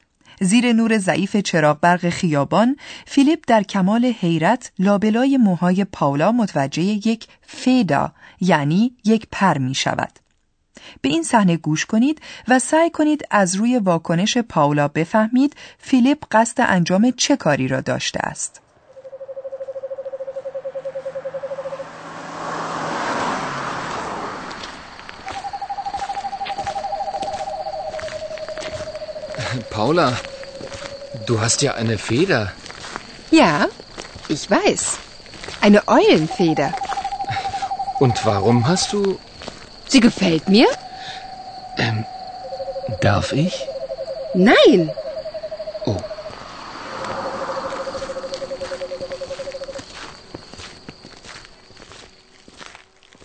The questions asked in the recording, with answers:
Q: به این صحنه گوش کنید و سعی کنید از روی واکنش پاولا بفهمید فیلیپ قصد انجام چه کاری را داشته است.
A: Philipp سعی می‌کند آن پر را از لای موهای پاولا بیرون بکشد.